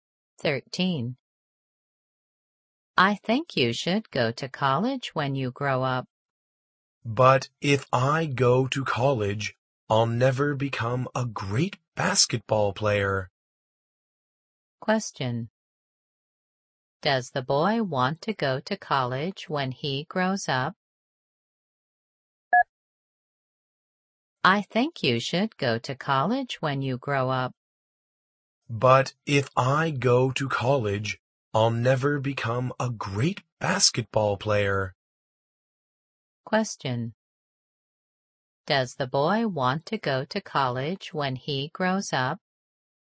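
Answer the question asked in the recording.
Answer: No, he wants to become a great basketball player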